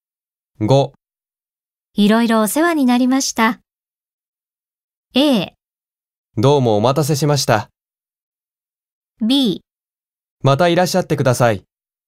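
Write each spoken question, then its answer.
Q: いろいろお世話になりました。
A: B: またいらっしゃってください。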